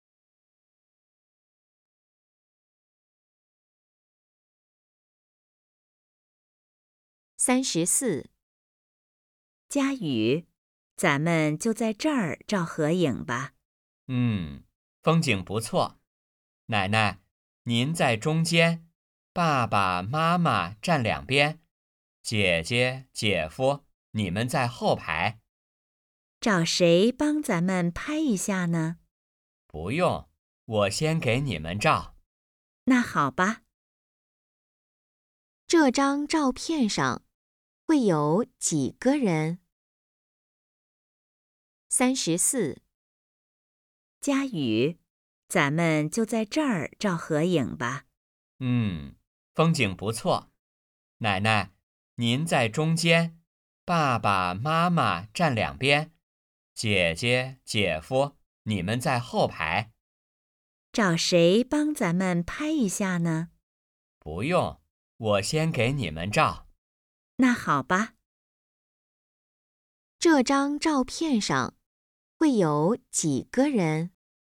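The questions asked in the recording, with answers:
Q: 这张照片上会有几个人?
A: 五个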